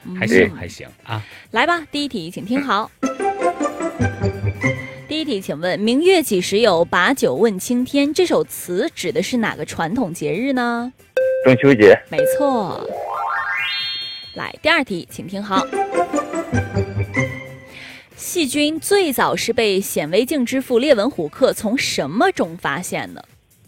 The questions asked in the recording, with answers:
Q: 请问"明月几时有,把酒问青天"这首词指的是哪个传统节日呢?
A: 没错。